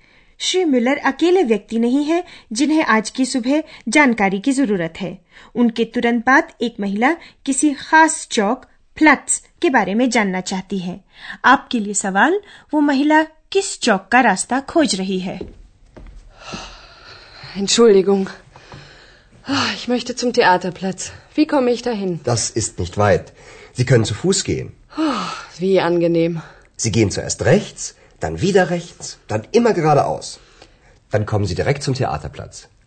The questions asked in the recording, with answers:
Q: वो महिला किस चौक का रास्ता खोज रही है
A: वो महिला theatre plus खोज रही है